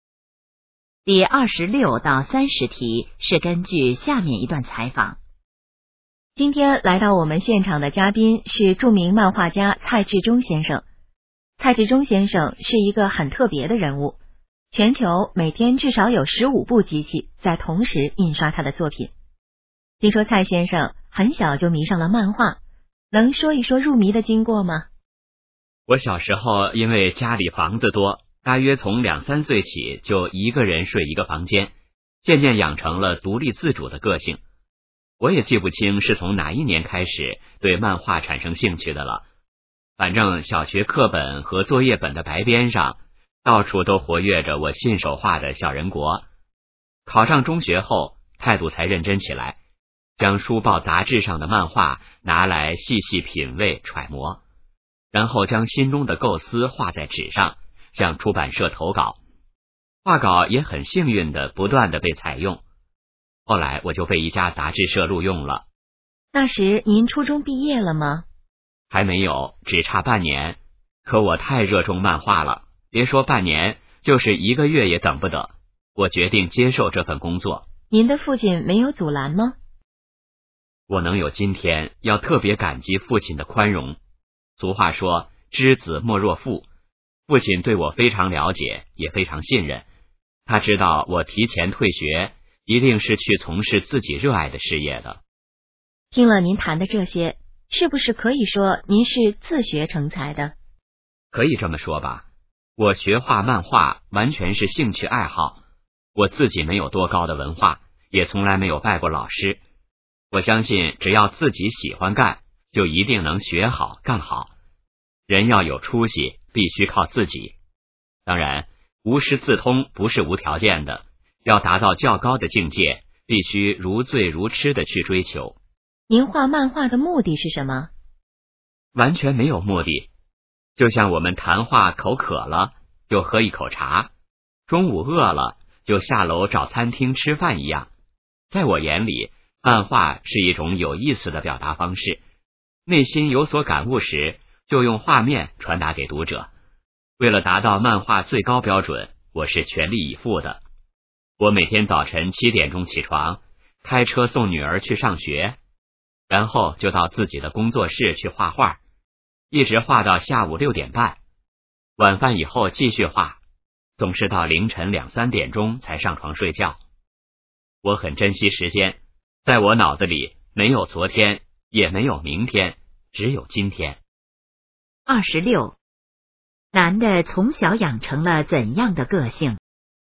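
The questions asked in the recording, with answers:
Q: 男的从小养成了怎样的个性?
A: 独立自主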